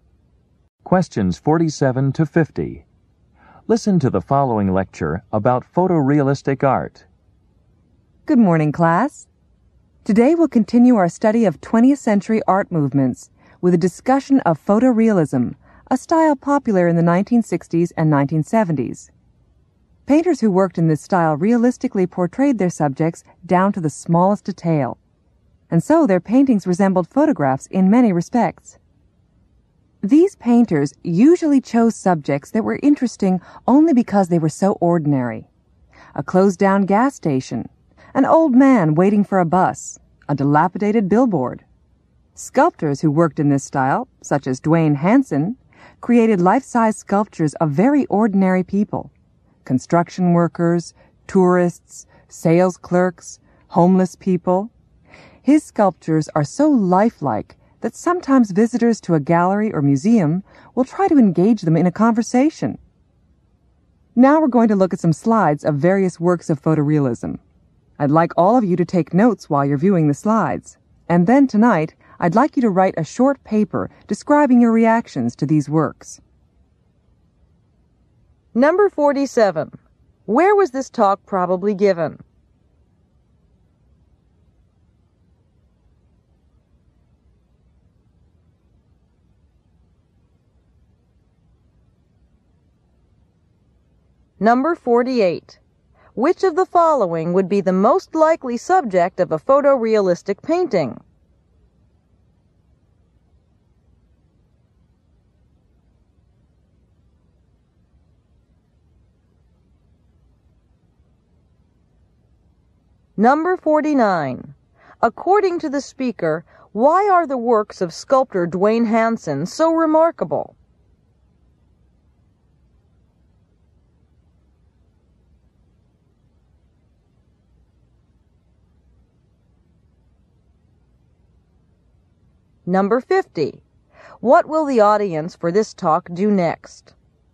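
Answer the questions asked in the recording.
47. In an art class
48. An ordinary scene, such as a closed-down gas station
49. They are extremely lifelike.
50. Look at slides and take notes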